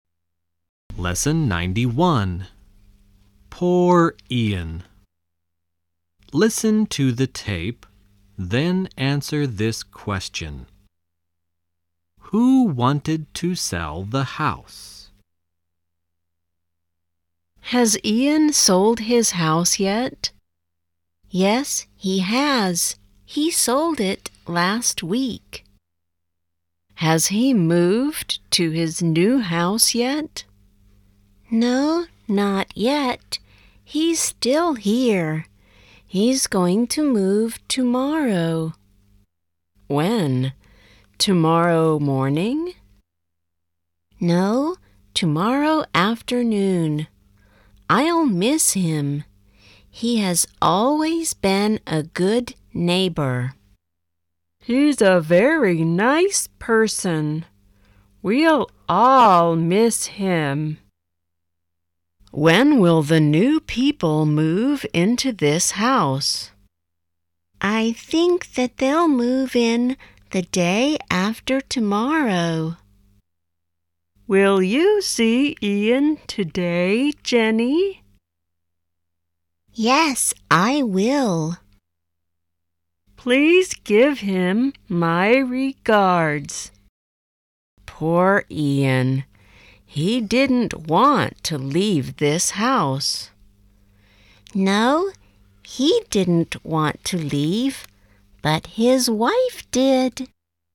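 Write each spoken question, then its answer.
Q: Who wanted to sell the house?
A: Ian's wife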